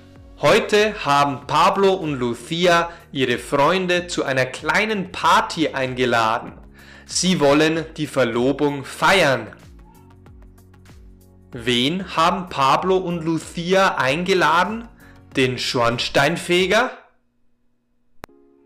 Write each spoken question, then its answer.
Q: Wen haben Pablo und Lucia eingeladen?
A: Pablo und Lucia haben ihre Freunde eingeladen.